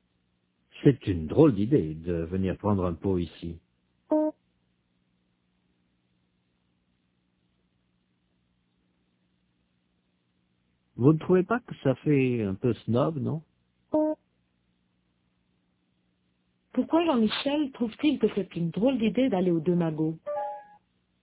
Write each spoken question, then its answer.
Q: Pourquoi Jean-Michel trouve-t-il que c'est une drôle d'idée d'aller aux deux magots?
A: Parce que ça fait un peu snob?